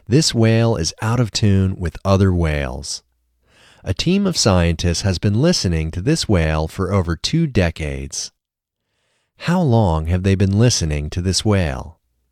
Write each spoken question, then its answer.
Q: How long have they been listening to this whale?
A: They have been listening to this whale for over 2 decades.